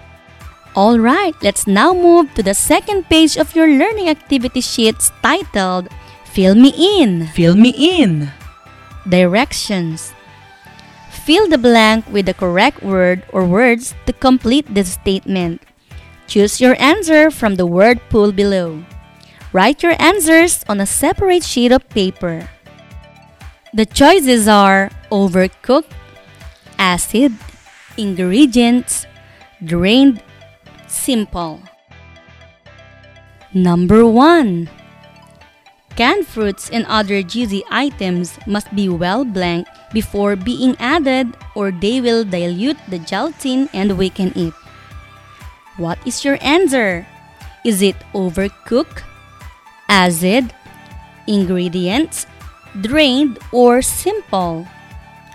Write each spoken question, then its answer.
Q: Canned fruits and other juicy items must be well blanked before being added or they will dilute the gelatin and weaken it.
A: The answer is drained.